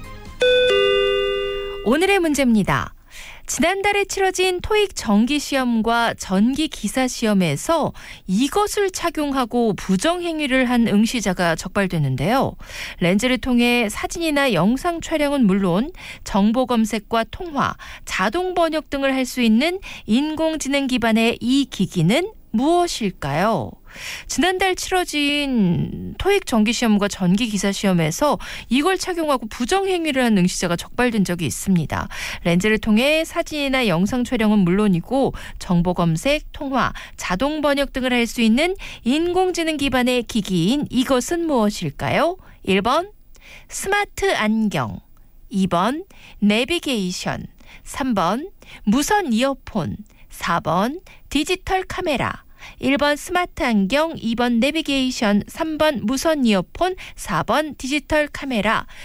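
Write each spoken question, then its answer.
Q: 렌즈를 통해 사진이나 영상 촬영은 물론이고 정보 검색, 통화, 자동 번역 등을 할 수 있는 인공지능 기반의 기기인 이것은 무엇일까요?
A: 1: 스마트 안경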